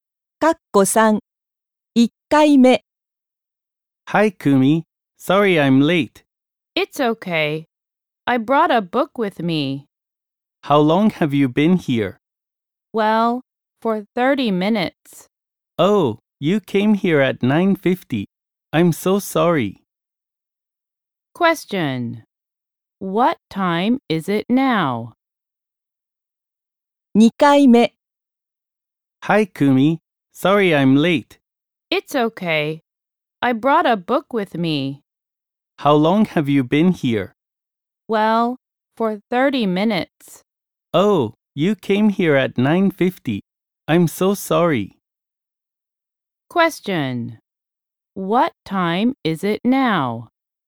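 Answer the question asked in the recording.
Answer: 10:20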